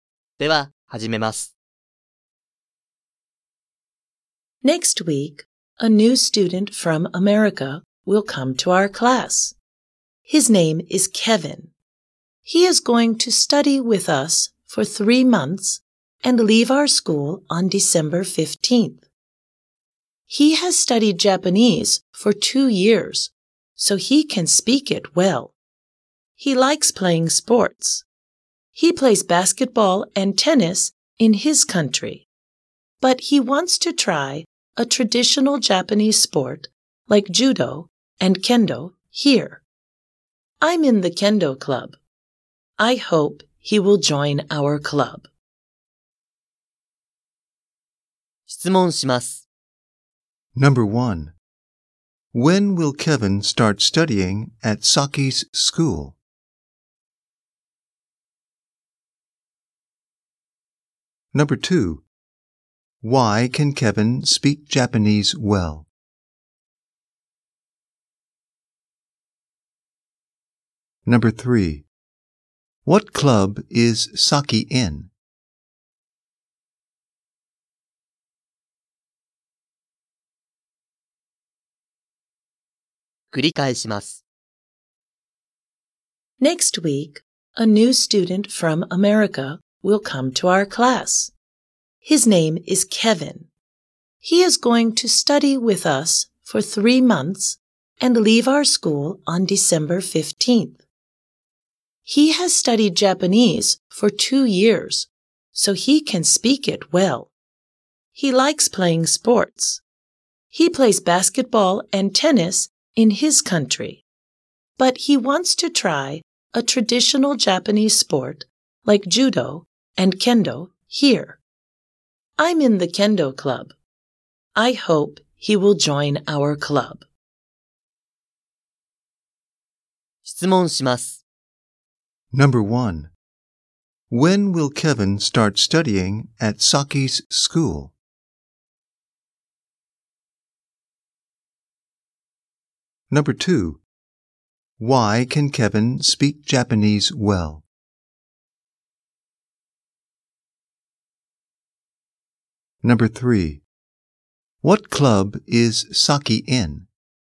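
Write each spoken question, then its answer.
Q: When will Kevin start studying at Saki's school?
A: Next week.

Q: Why can Kevin speak Japanese well?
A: Because he has studied Japanese for 2 years.

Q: What club is Saki in?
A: The kendo club.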